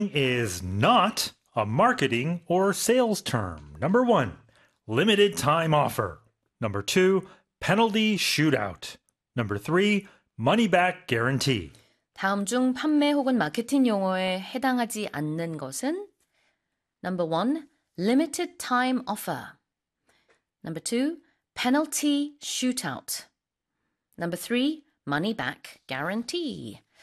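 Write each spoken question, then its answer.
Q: is not a marketing or sales term.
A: 2: penalty shootout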